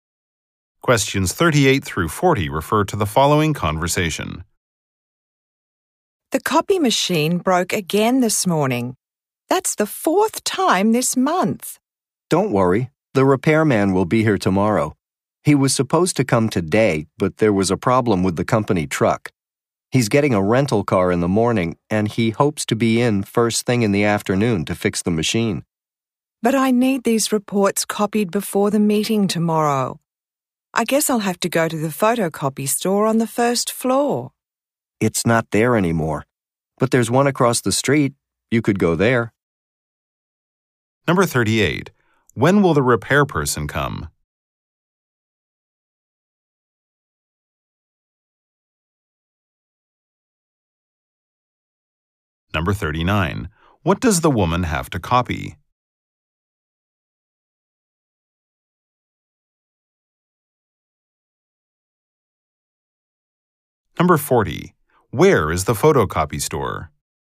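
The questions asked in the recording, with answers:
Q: When will the repair person come?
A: Tomorrow afternoon

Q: What does the woman have to copy?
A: Reports

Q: Where is the photocopy store?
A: Across the street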